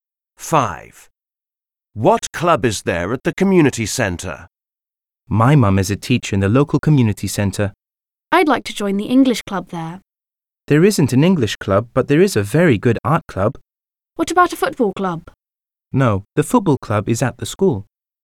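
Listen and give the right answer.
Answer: an art club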